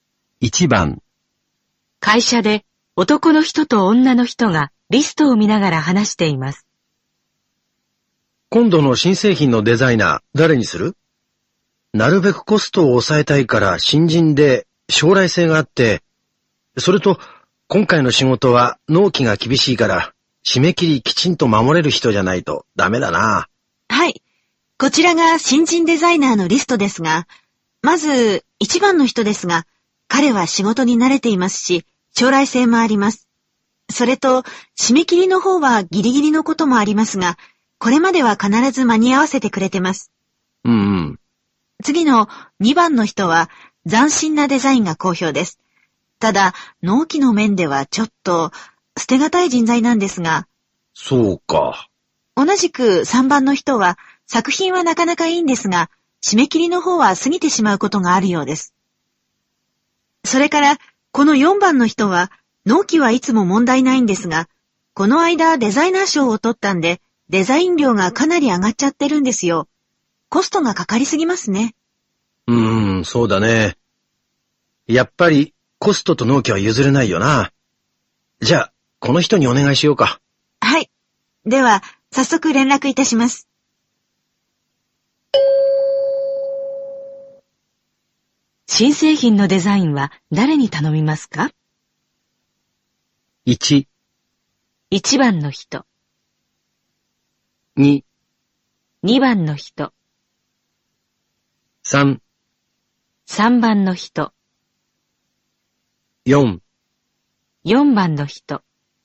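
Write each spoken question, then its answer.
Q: 新製品のデザインは誰に頼みますか?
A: 1: 1番の人。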